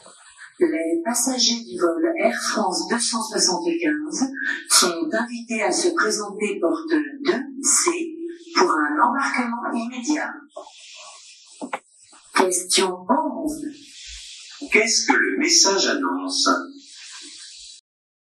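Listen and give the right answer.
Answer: L'embarquement immédiat du vol Air France 275, porte 2C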